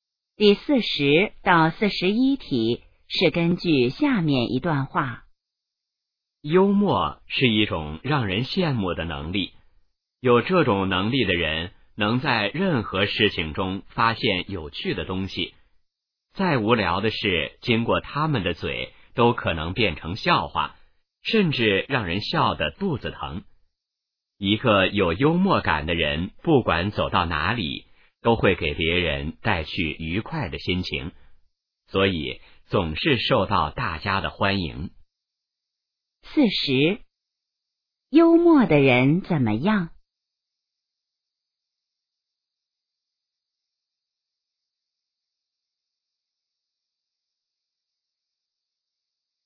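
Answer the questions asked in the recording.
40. 能在任何事情中发现有趣的东西
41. 给别人带去愉快的心情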